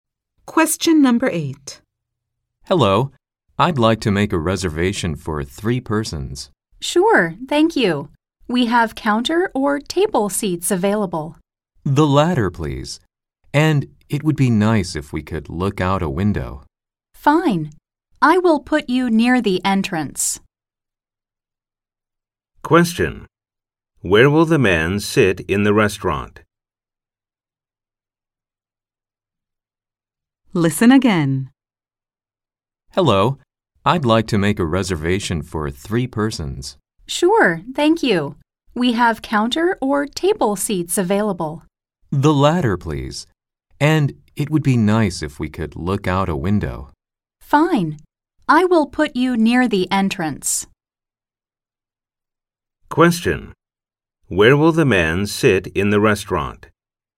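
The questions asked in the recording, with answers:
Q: Where will the man sit in the restaurant?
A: At a table by a window near the entrance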